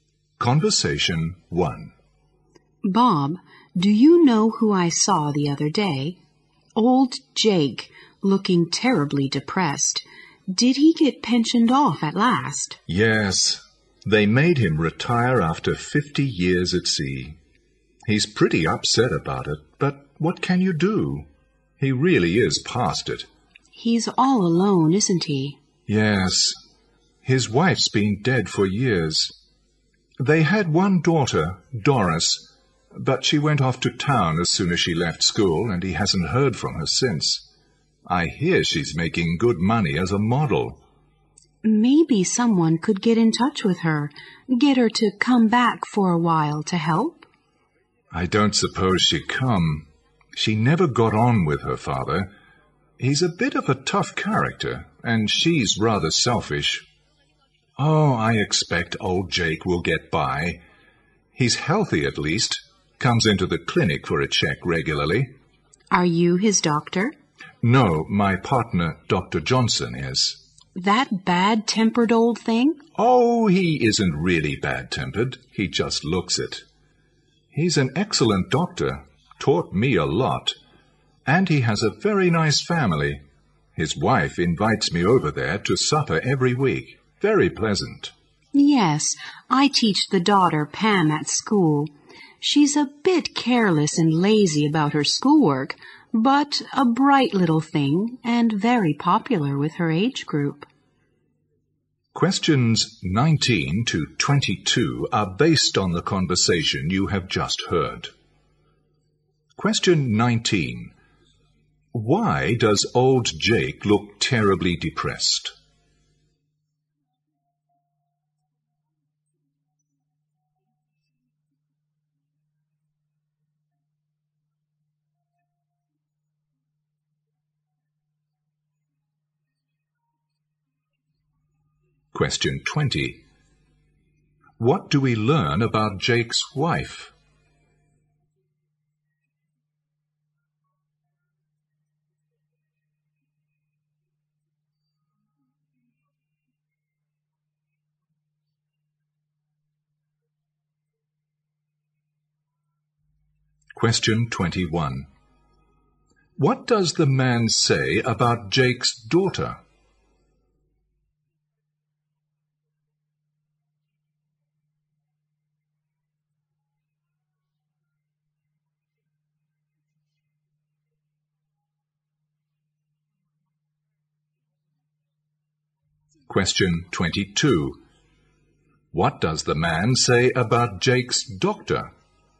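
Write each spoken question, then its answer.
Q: Why does old Jake look terribly depressed?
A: He was made to retire after 50 years at sea.

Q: What do we learn about Jake's wife?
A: She has been dead for years.

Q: What does the man say about Jake's doctor?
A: He looks bad-tempered but is an excellent doctor.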